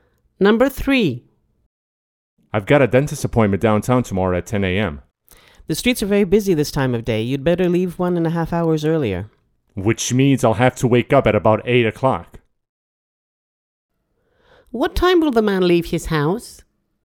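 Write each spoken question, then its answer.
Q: What time will the man leave his house?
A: At 8:30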